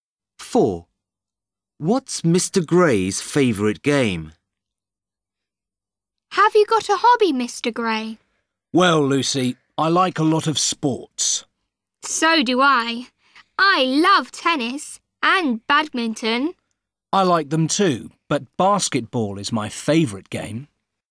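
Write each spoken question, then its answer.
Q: What's Mr. Gray's favourite game?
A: basketball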